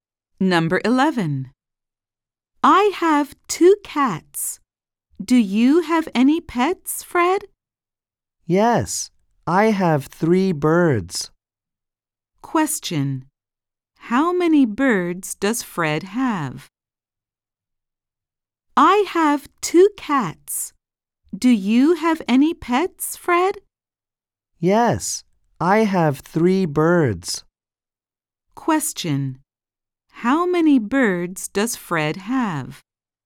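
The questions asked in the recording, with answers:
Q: How many birds does Fred have?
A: three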